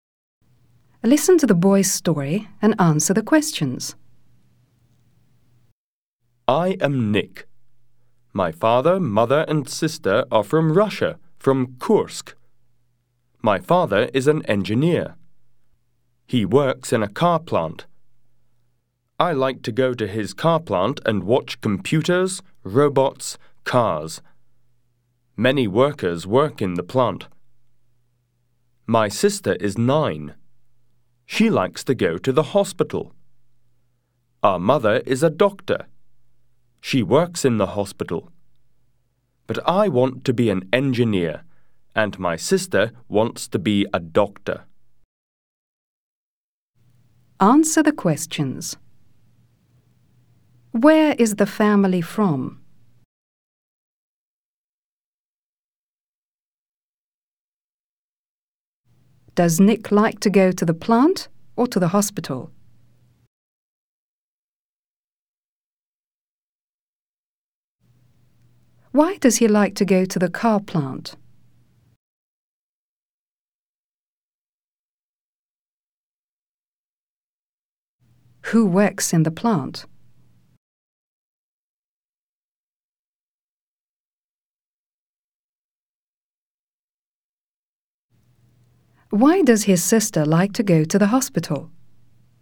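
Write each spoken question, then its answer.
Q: Where is the family from?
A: From Kursk, Russia

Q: Does Nick like to go to the plant or to the hospital?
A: To the plant

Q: Why does he like to go to the car plant?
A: To watch computers, robots and cars

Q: Who works in the plant?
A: His father and many workers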